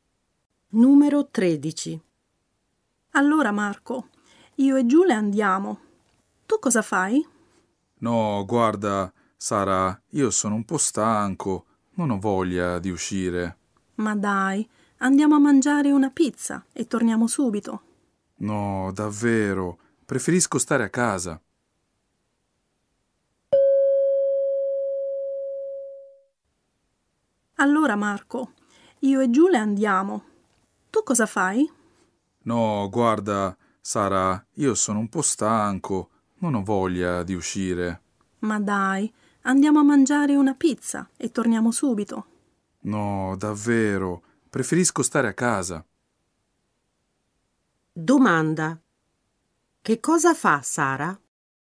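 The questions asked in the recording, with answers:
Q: Che cosa fa Sara?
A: Va a mangiare una pizza con Giulia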